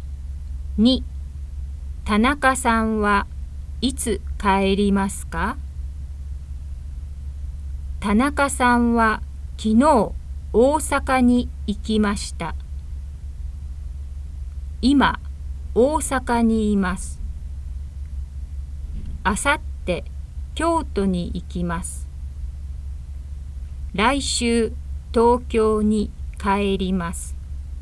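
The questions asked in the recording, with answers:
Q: 田中さんはいつ帰りますか?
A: 来週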